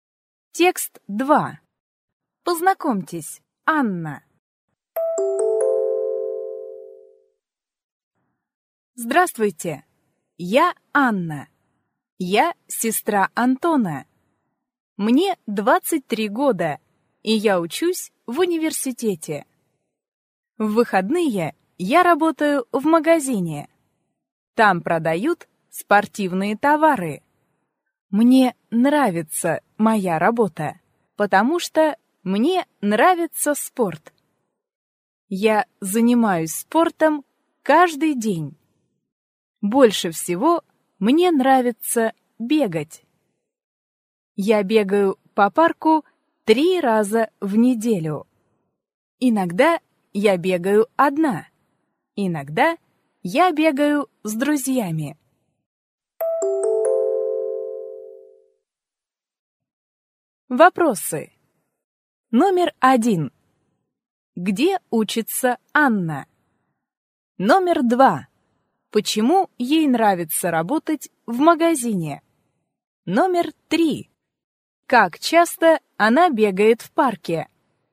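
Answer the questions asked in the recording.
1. В университете
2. Потому что ей нравится спорт
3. 3 раза в неделю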